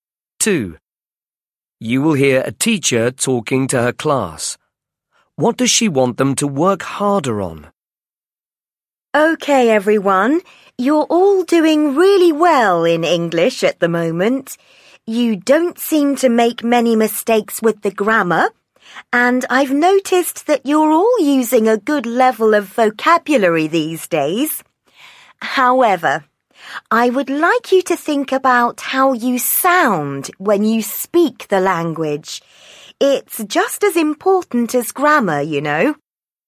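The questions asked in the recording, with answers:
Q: What does she want them to work harder on?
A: Pronunciation (how they sound when speaking)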